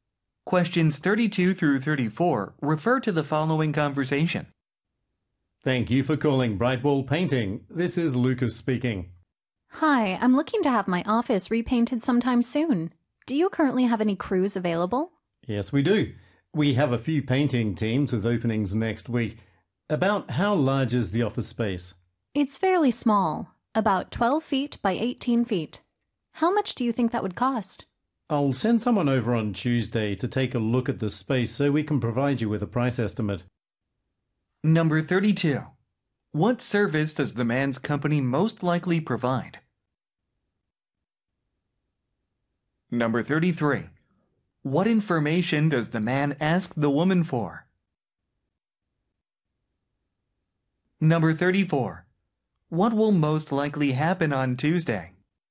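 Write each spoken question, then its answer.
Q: What service does the man's company most likely provide?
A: Painting

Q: What information does the man ask the woman for?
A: The size of the office space

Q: What will most likely happen on Tuesday?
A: Someone will inspect the space to give a price estimate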